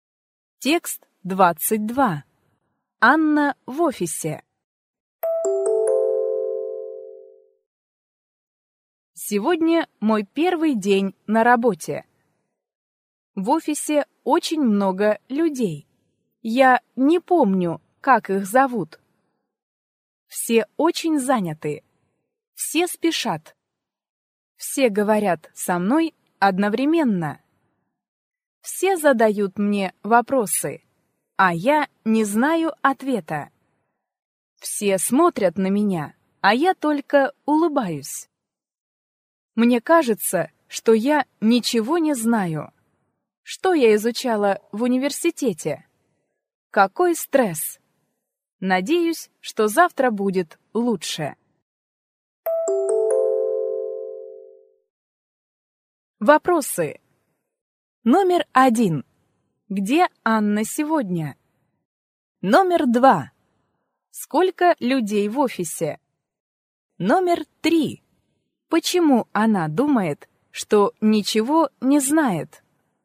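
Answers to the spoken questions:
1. В офисе, на работе (первый день)
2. Очень много
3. Все задают ей вопросы, а она не знает ответа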